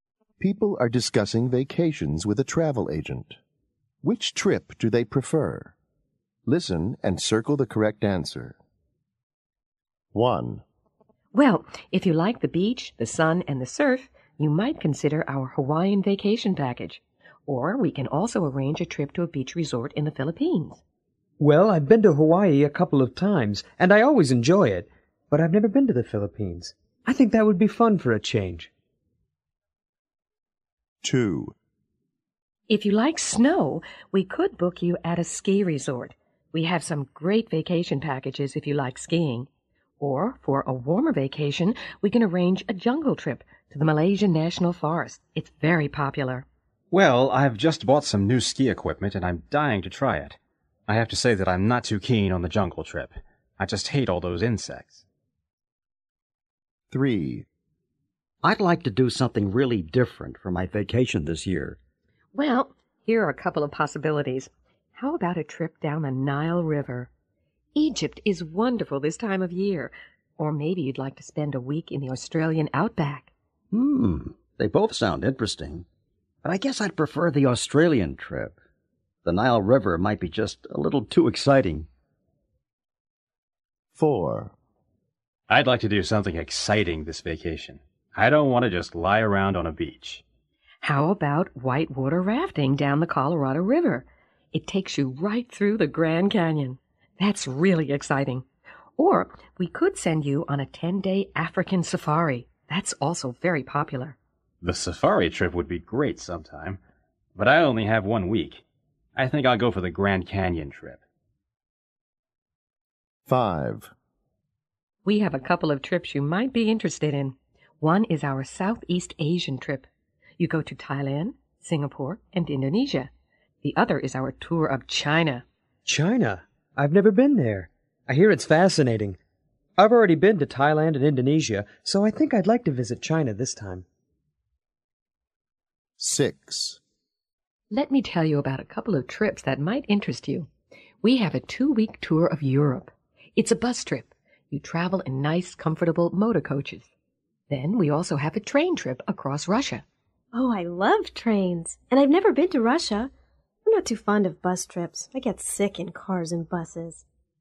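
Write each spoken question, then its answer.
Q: Which trip do they prefer?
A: The beach resort in the Philippines

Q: Which trip do they prefer?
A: The ski resort

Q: Which trip do they prefer?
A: The Australian outback trip

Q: Which trip do they prefer?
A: Whitewater rafting through the Grand Canyon

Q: Which trip do they prefer?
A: The tour of China

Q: Which trip do they prefer?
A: The train trip across Russia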